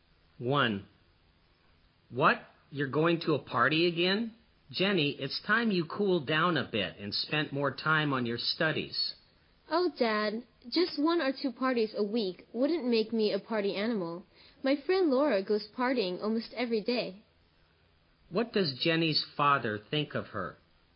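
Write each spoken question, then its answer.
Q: What does Jenny's father think of her?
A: He thinks she goes to too many parties and should spend more time on her studies.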